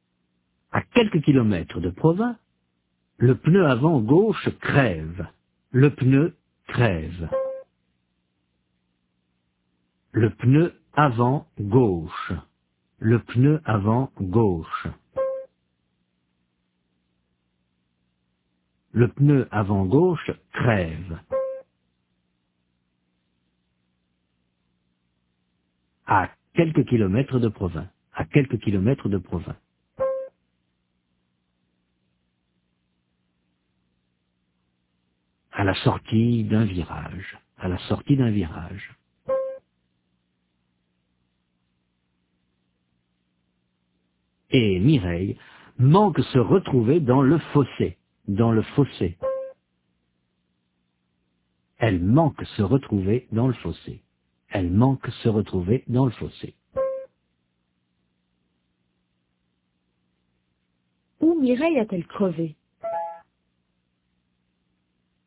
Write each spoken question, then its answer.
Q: Où Mireille a-t-elle crevé ?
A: à la sortie d'un virage.